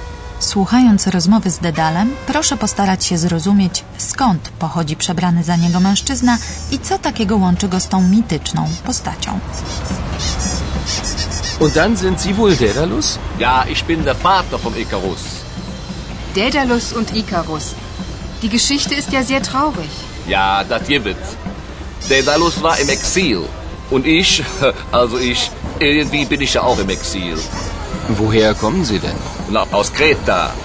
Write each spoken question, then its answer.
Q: Słuchając rozmowy z Dedalem, proszę postarać się zrozumieć, skąd pochodzi przebrany za niego mężczyzna i co takiego łączy go z tą mityczną postacią.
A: Właśnie z tej wyspy pochodzi mężczyzna przebrany za Dedala.